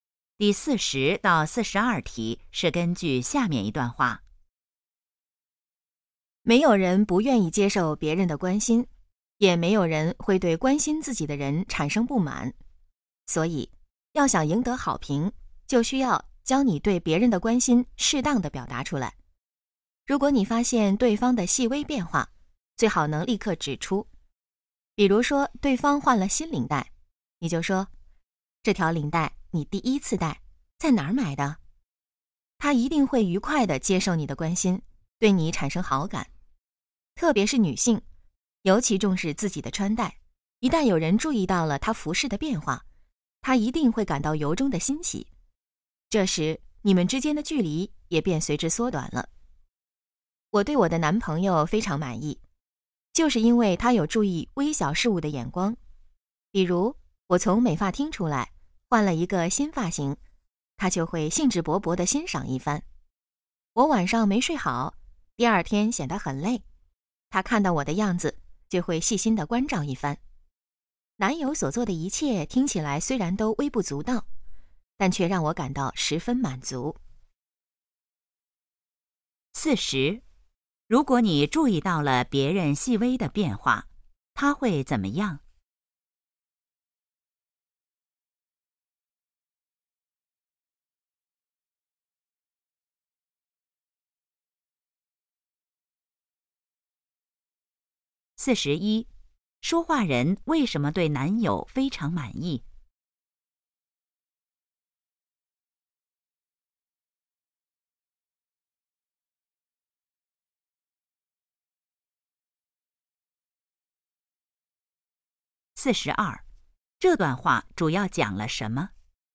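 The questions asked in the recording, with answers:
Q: 如果你注意到了别人细微的变化,他会怎么样?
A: 愉快地接受你的关心,对你产生好感

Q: 说话人为什么对男友非常满意?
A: 他能注意到微小的事物

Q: 这段话主要讲了什么?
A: 要适当表达对别人的关心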